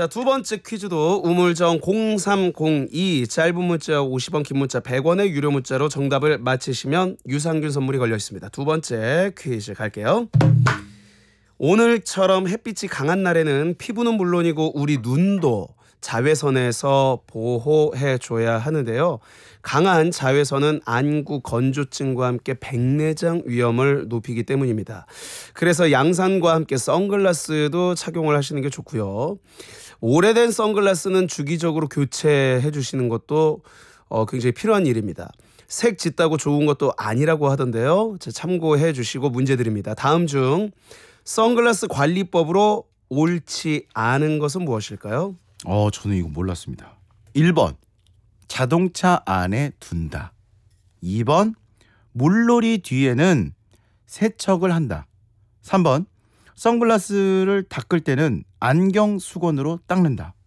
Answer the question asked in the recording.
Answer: 정답은 1번이었습니다.